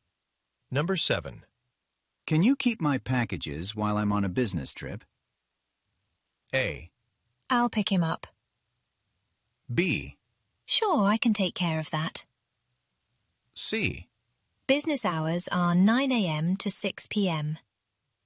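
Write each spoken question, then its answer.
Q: Can you keep my packages while I'm on a business trip?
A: B: Sure, I can take care of that.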